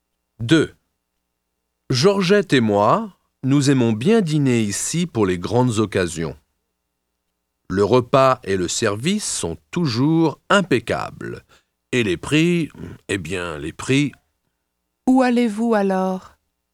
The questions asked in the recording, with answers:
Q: Où allez-vous alors?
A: Nous allons au restaurant.